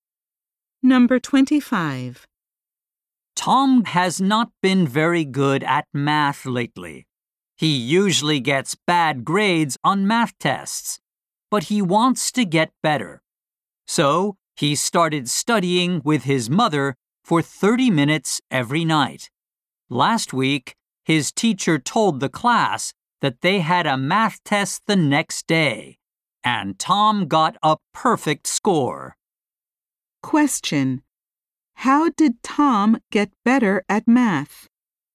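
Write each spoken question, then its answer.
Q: How did Tom get better at math?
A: He studied with his mother every night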